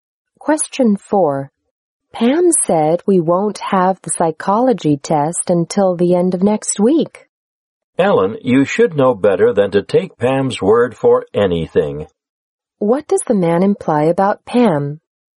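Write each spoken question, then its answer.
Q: What does the man imply about Pam?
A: Pam is not reliable.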